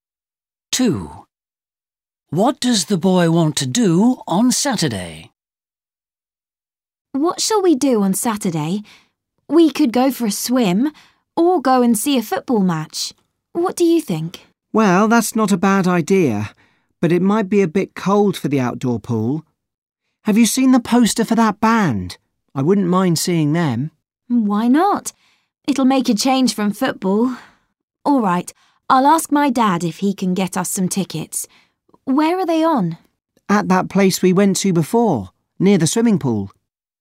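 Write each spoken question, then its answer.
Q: What does the boy want to do on Saturday?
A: Go and see a band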